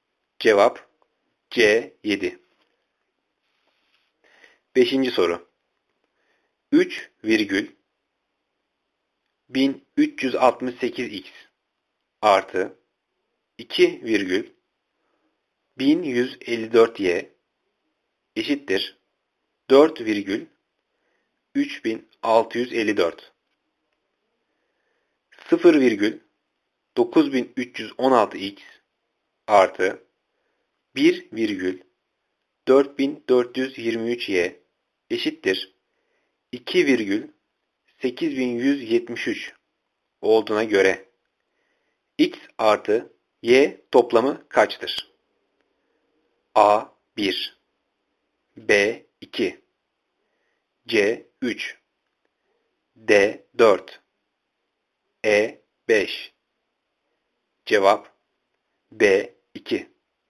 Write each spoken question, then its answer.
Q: 4423y eşittir 2 virgül 8173 olduğuna göre x artı y toplamı kaçtır?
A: Cevap B 2.